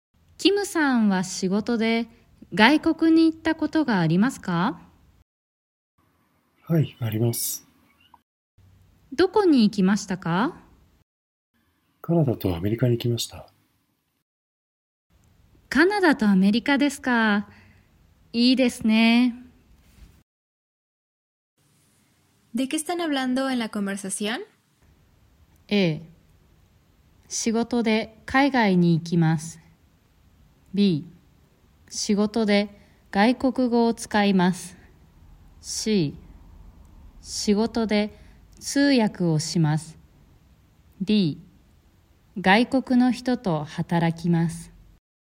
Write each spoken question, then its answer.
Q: ¿De qué están hablando en la conversación?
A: La respuesta correcta es A, porque están hablando sobre ir al extranjero por el trabajo.